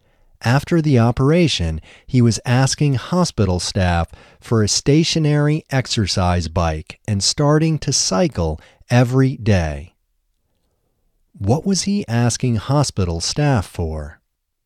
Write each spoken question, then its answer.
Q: What was he asking hospital staff for?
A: He was asking hospital staff for a stationary exercise bike.